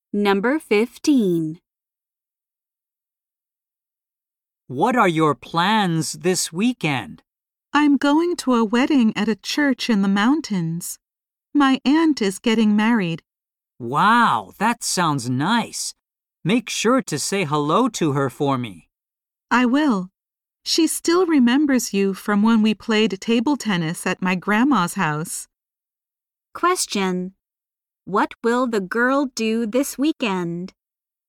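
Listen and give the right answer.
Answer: Go to her aunt's wedding at a church in the mountains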